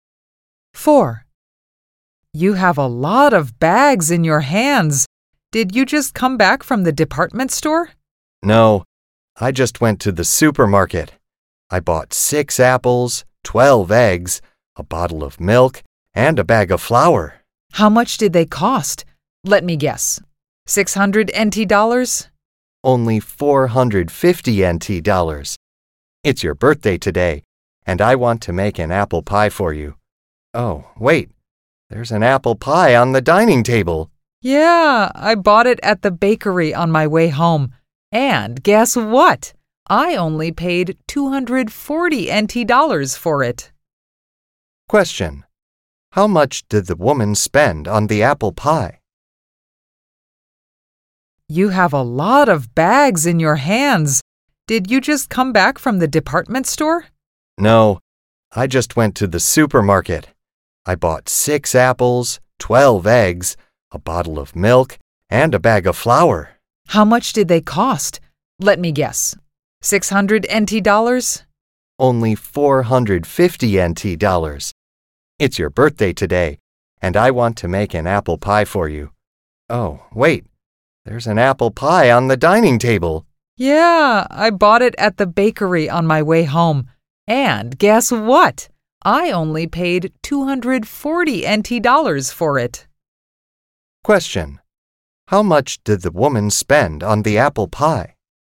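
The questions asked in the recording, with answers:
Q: How much did the woman spend on the apple pie?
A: 240 NT dollars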